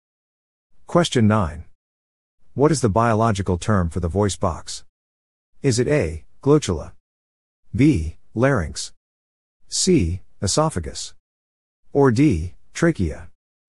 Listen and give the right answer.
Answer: The answer is B, larynx.